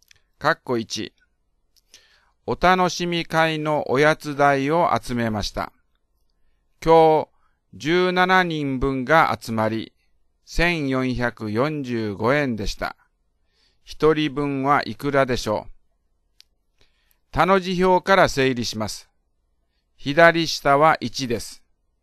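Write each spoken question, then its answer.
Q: 一人分はいくらでしょう。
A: 85円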